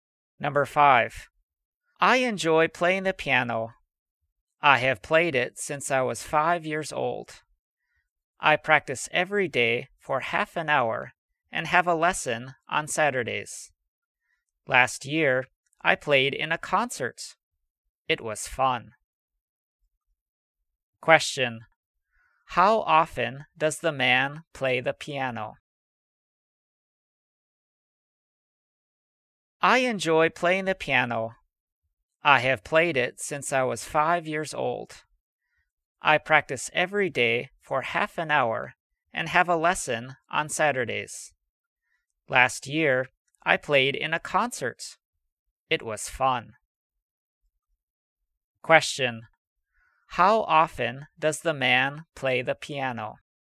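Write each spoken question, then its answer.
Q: How often does the man play the piano?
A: Every day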